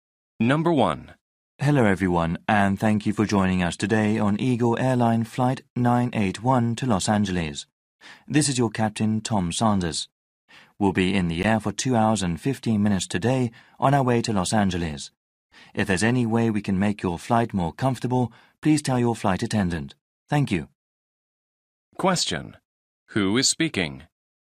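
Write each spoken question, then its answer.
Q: Who is speaking?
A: The pilot (captain) of the flight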